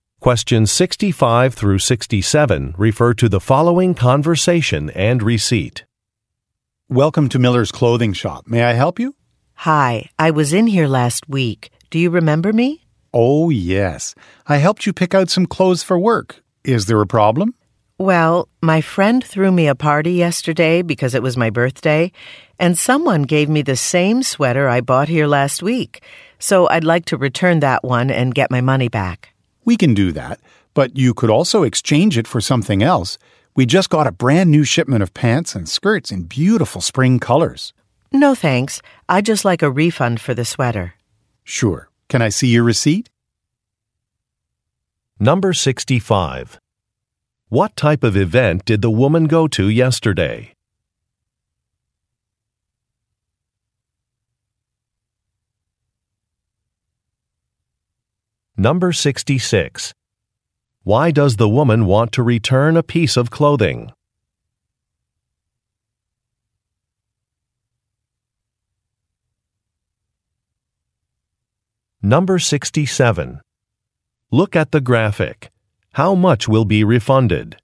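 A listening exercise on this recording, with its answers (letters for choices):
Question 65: What type of event did the woman go to yesterday?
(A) A retirement celebration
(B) A birthday party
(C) An awards ceremony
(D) A business conference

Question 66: Why does the woman want to return a piece of clothing?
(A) She received the same item as a gift.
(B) She found a better price in another store.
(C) The item was damaged.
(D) The item does not fit well.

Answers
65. B
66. A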